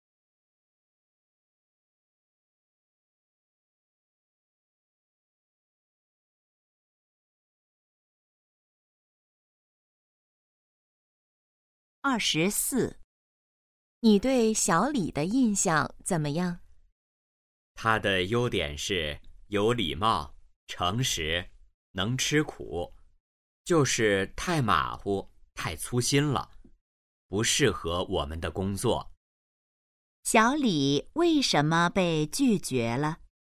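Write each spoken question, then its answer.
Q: 小李为什么被拒绝了?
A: 太马虎、太粗心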